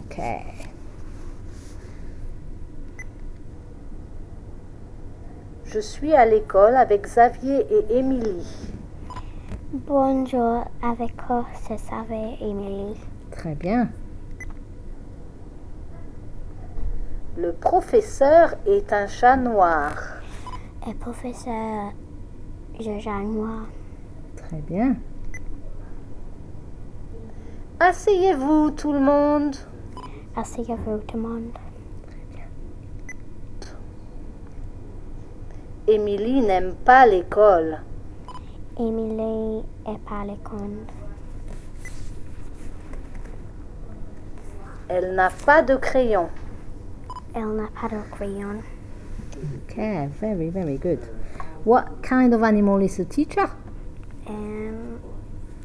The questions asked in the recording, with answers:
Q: What kind of animal is the teacher?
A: No, un chat noir.